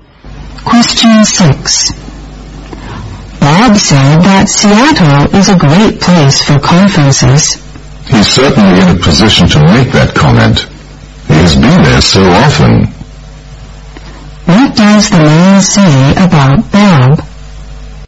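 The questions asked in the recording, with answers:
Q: What does the man say about Bob?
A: Bob has been to Seattle often, so he knows it well.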